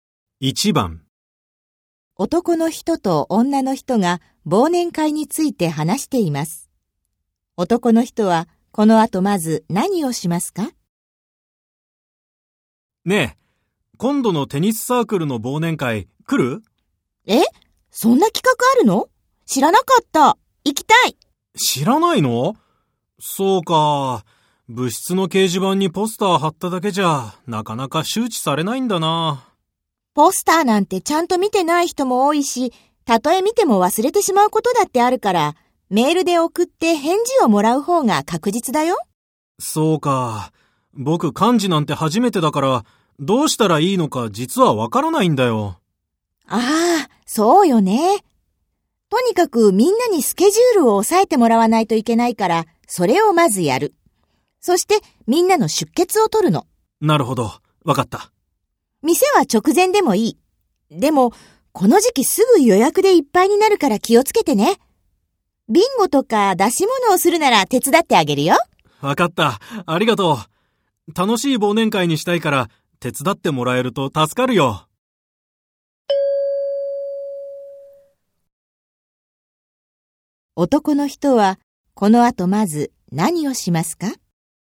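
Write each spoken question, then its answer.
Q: 男の人はこの後まず何をしますか?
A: メールでみんなに忘年会の日程を知らせ、スケジュールを押さえてもらう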